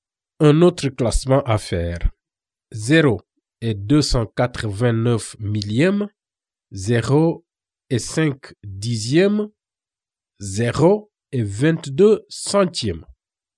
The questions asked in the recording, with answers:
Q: Un autre classement à faire.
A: Du plus grand au plus petit, la réponse est 0 et 5 dixièmes, 0 et 299 millièmes, 0 et 22 centièmes.